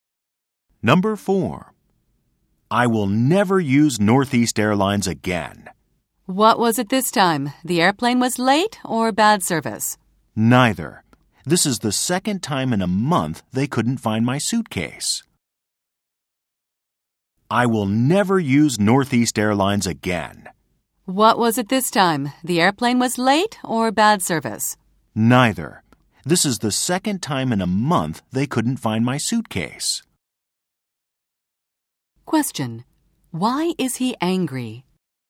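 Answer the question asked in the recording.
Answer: The airline couldn't find his suitcase again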